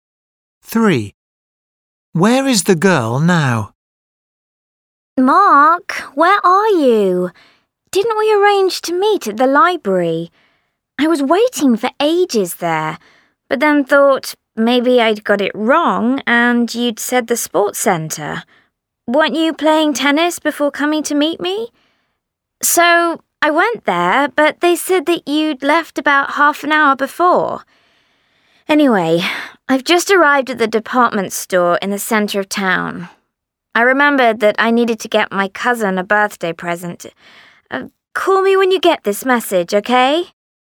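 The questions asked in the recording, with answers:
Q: Where is the girl now?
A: the department store in the town centre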